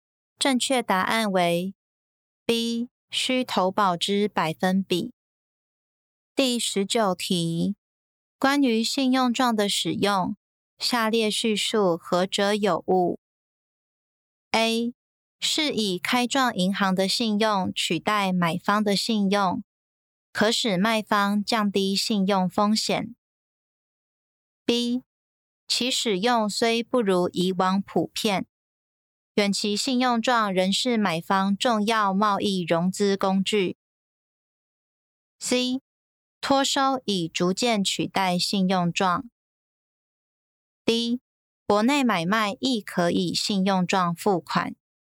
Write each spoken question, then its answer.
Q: 关于信用状的使用,下列叙述何者有误?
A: 正确答案为 C. 托收已逐渐取代信用状。